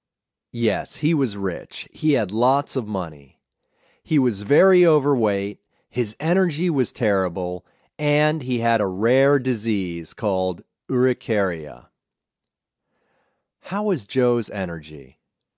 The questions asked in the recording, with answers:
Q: How was Joe's energy?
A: His energy was terrible.